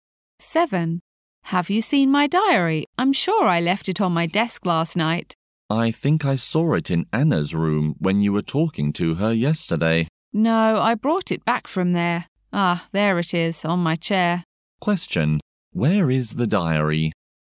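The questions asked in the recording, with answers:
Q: where is the diary?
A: On the chair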